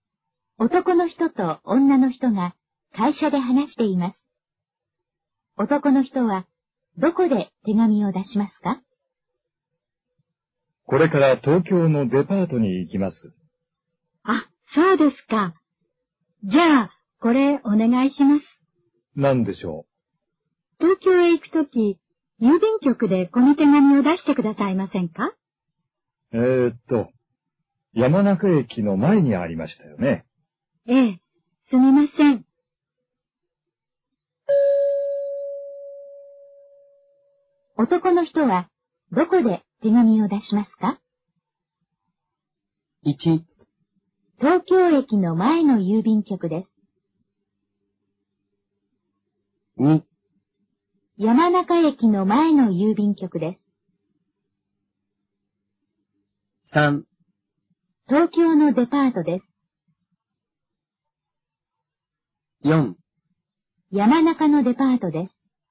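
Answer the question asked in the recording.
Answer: 2: 山中駅の前の郵便局です。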